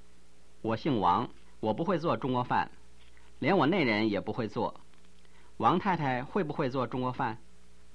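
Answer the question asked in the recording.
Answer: 不会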